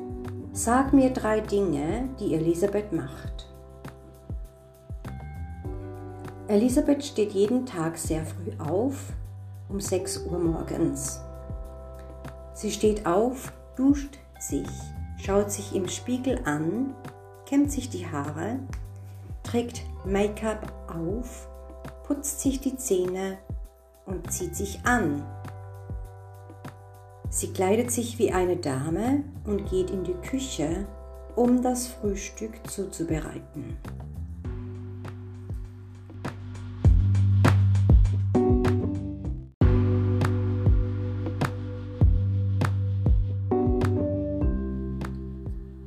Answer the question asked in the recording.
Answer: Sie steht auf. Sie schaut sich im Spiegel an.